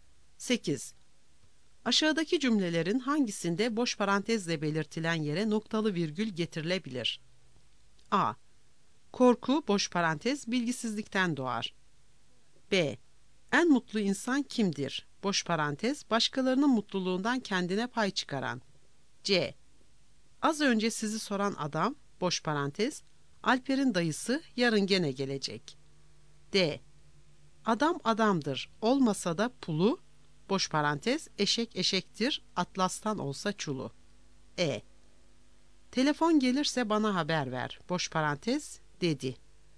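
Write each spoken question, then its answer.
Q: Aşağıdaki cümlelerin hangisinde boş parantezle belirtilen yere noktalı virgül getirilebilir?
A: D: Adam adamdır, olmasa da pulu, eşek eşektir, atlastan olsa çulu.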